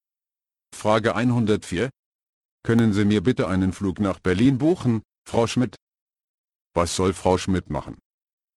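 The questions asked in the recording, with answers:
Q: Was soll Frau Schmidt machen?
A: einen Flug nach Berlin buchen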